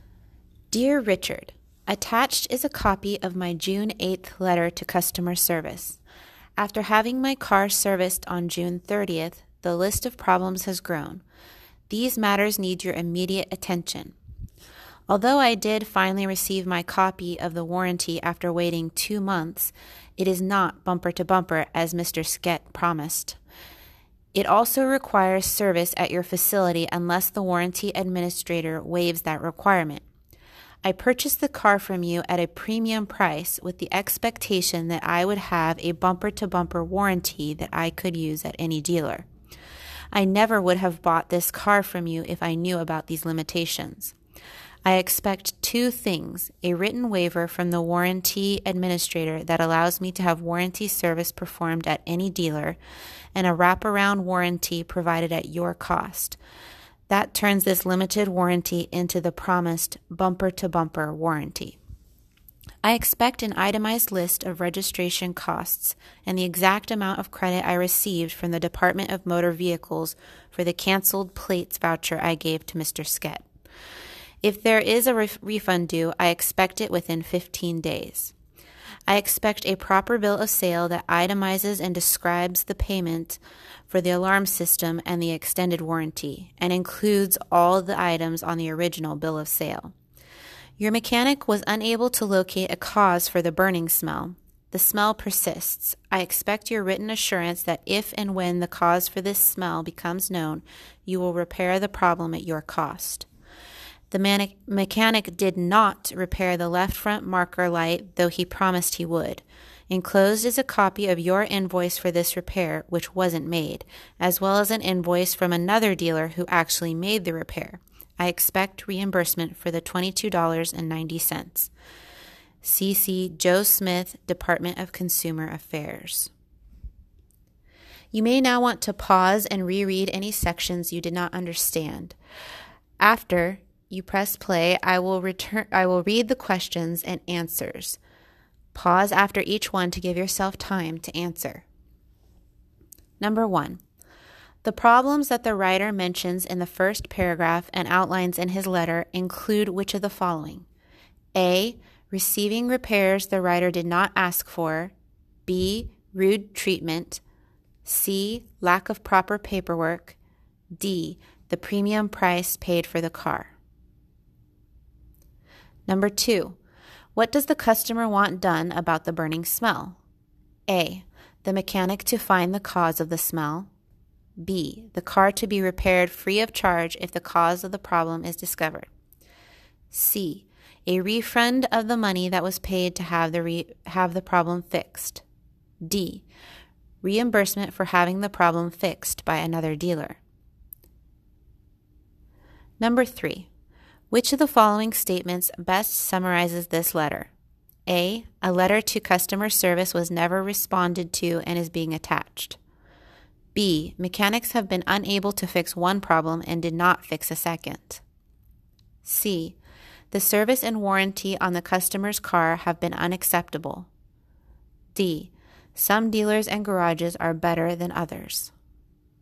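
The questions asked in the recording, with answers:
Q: what does the customer want done about the burning smell?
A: B: the car to be repaired free of charge if the cause of the problem is discovered

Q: which of the following statements best summarizes this letter?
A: C: the service and warranty on the customer's car have been unacceptable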